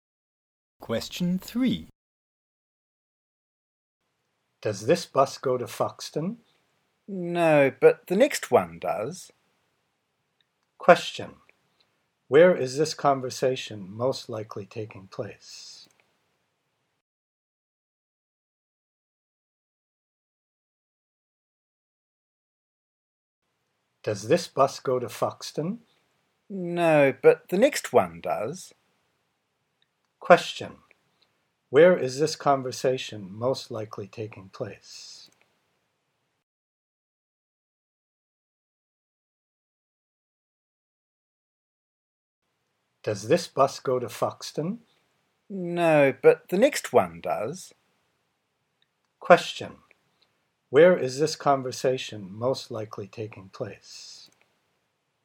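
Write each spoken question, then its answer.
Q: Where is this conversation most likely taking place?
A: At a bus stop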